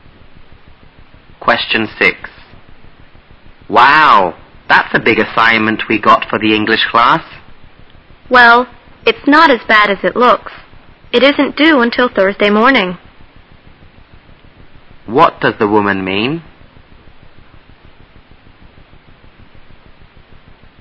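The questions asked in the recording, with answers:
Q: What does the woman mean?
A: The assignment isn't as hard as it looks; it isn't due until Thursday morning.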